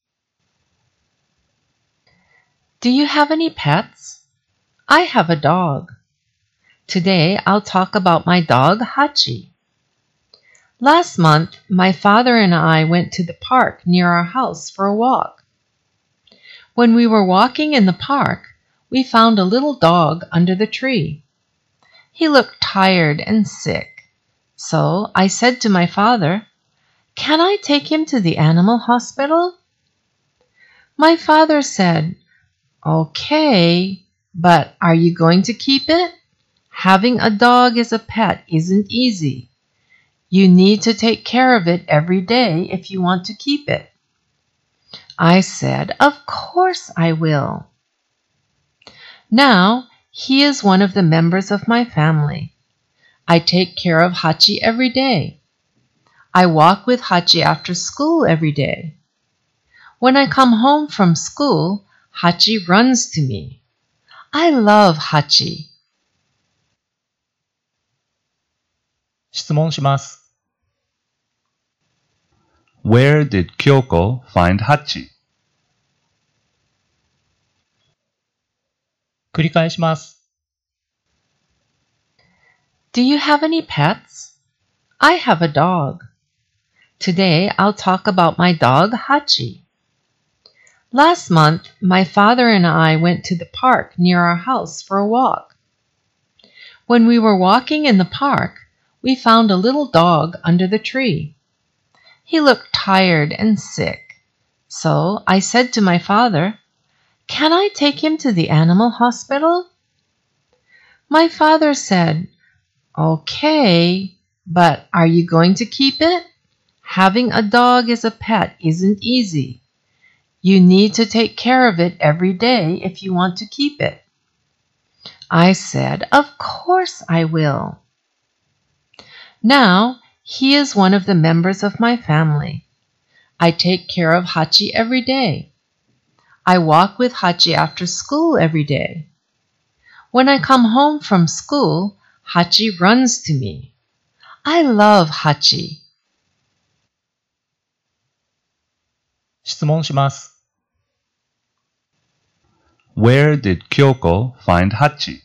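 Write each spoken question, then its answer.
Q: Where did Kyoko find Hachi?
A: Under a tree in the park near her house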